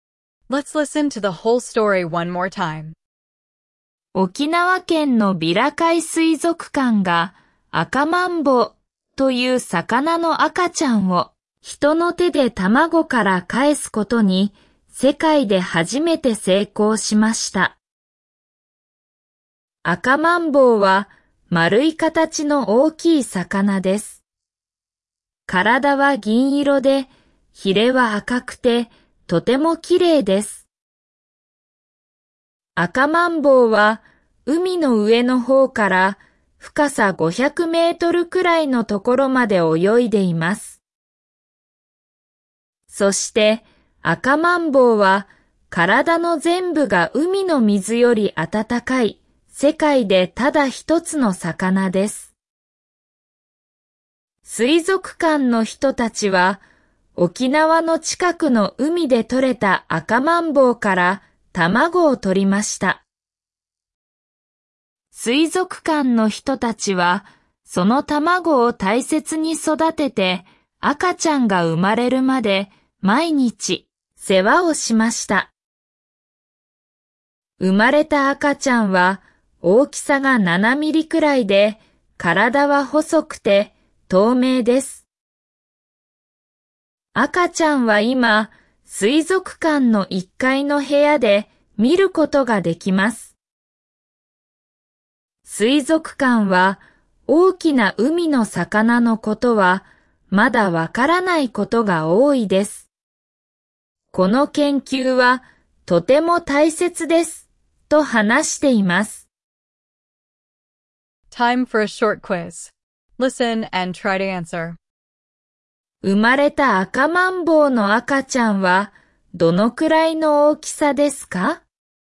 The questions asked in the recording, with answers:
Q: 生まれた赤マンボウの赤ちゃんはどのくらいの大きさですか?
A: About 7 millimeters, smaller than your fingernail.